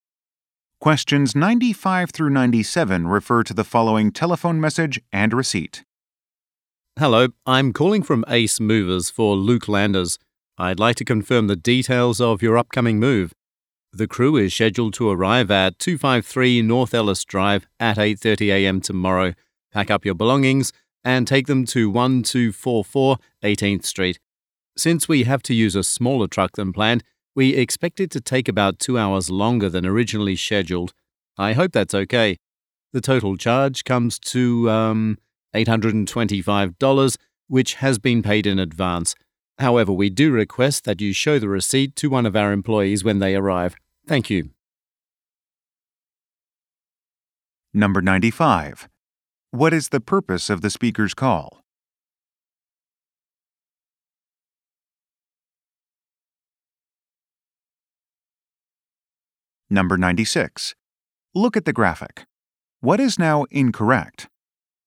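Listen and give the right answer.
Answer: To confirm the details of an upcoming move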